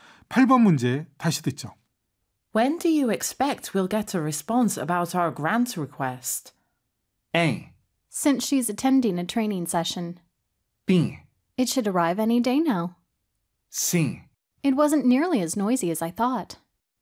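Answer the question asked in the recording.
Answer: B: It should arrive any day now.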